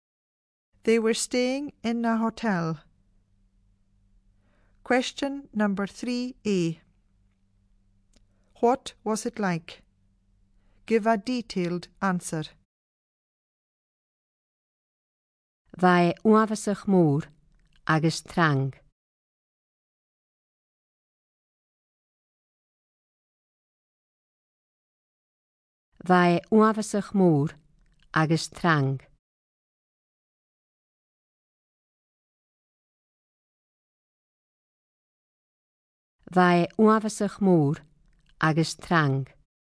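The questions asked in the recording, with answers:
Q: What was it like?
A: Very big and busy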